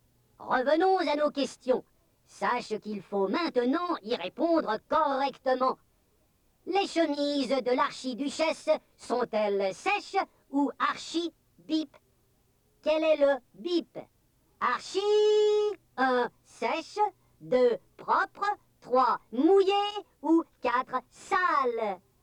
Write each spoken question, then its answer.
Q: Quel est le bip? Archi, 1, sèche, 2, propre, 3, mouillé ou 4, sale?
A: Les chemises de l'archiduchesse sont-elles sèches ou archi-sèches?